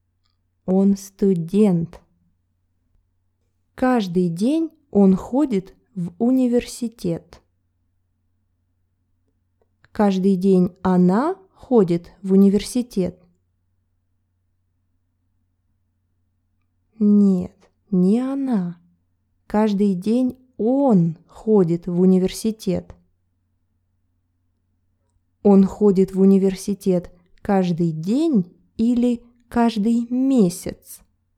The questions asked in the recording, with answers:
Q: Он ходит в университет каждый день или каждый месяц?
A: Каждый день. Он ходит в университет каждый